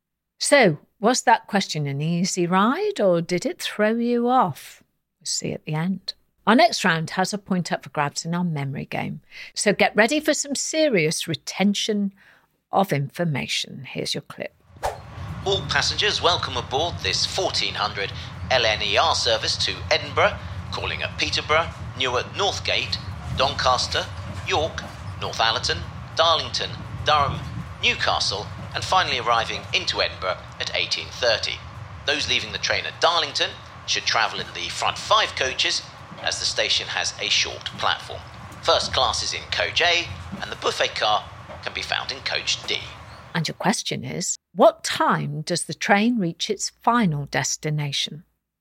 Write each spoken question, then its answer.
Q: what time does the train reach its final destination?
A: And the answer we're looking for was 18:30, 6:30, or 6:30 p.m.